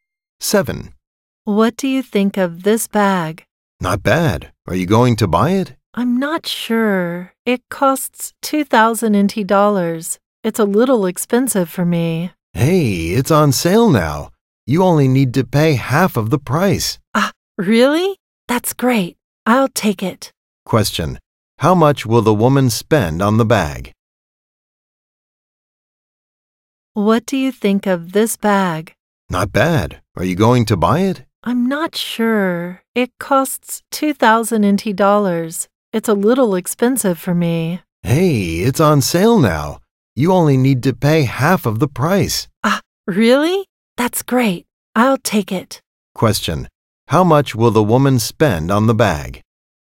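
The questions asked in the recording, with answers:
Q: How much will the woman spend on the bag?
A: $1,000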